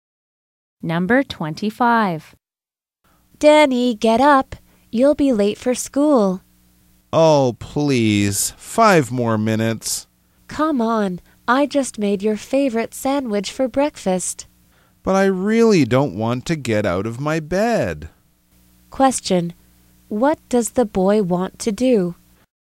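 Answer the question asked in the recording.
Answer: Stay in bed and sleep.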